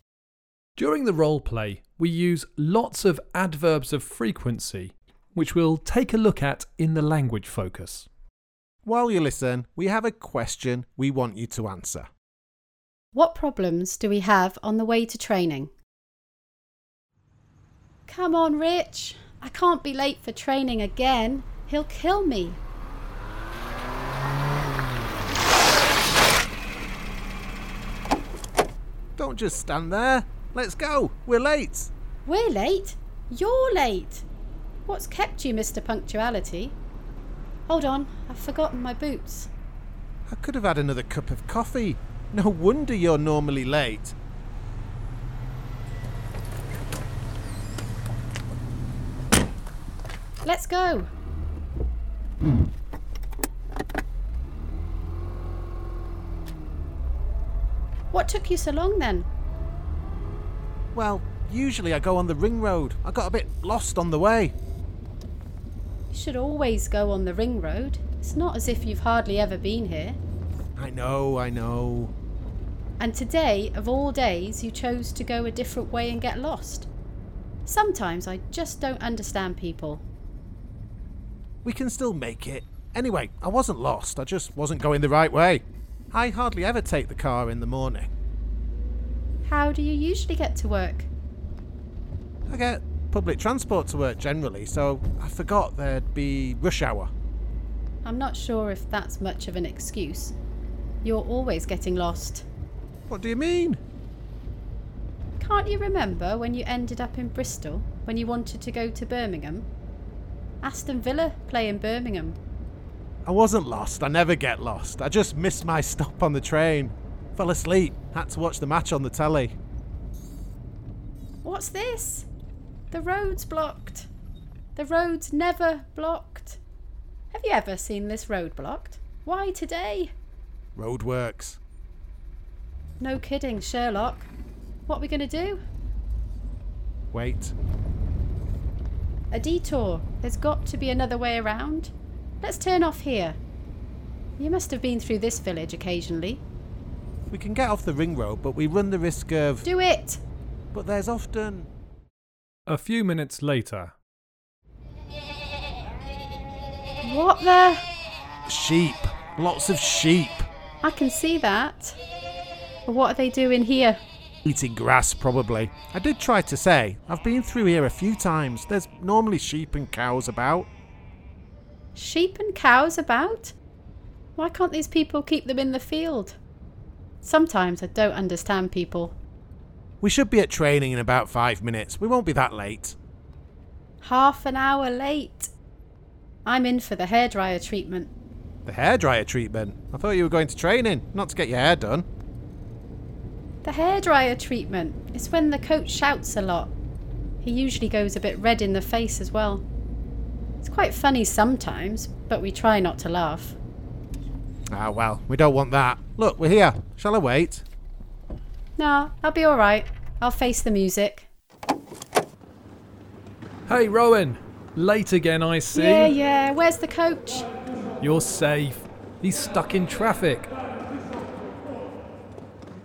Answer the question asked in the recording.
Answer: Well, the first problem was that Rich was late. Then the road was blocked because of some roadworks. And then when we took a detour, we got blocked by a flock of sheep.